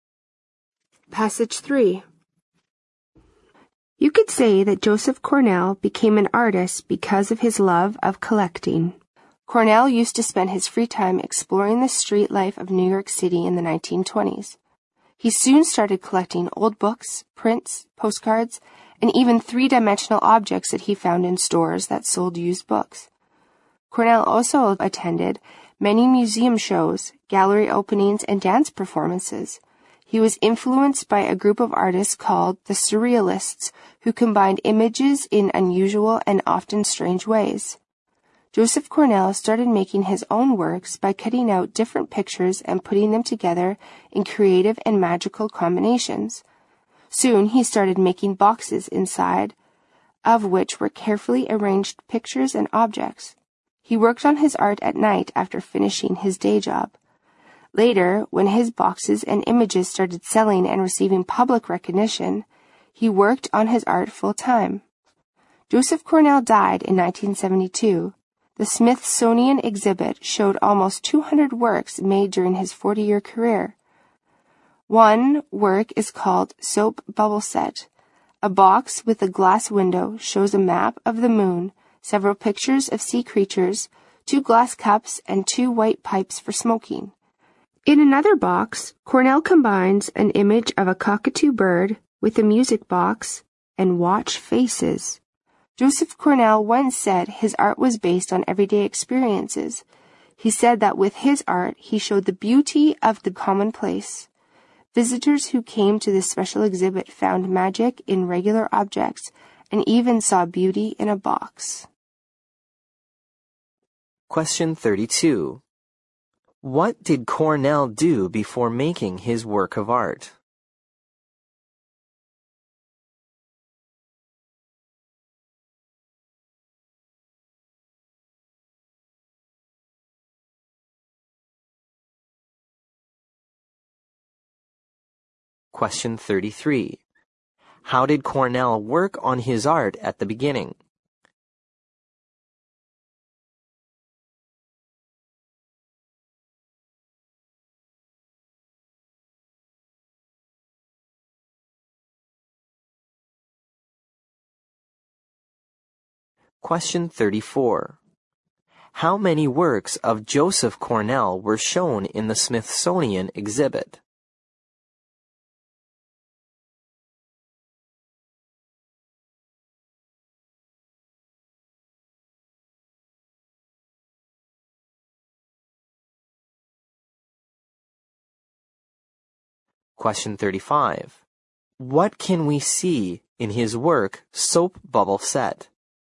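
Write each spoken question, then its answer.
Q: How did Cornell work on his art at the beginning?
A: At night after finishing his day job

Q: How many works of Joseph Cornell were shown in the Smithsonian exhibit?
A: Almost 200

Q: What can we see in his work, Soap Bubble Set?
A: A map of the moon, pictures of sea creatures, two glass cups and two white pipes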